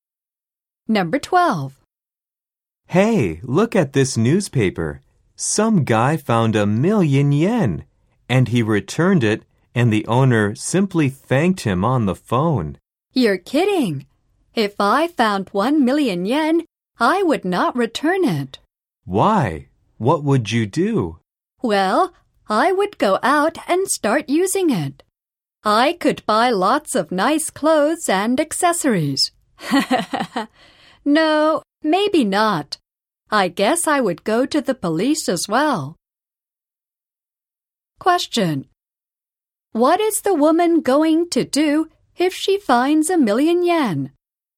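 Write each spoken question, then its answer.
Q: What is the woman going to do if she finds 1,000,000 yen?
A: Take it to the police.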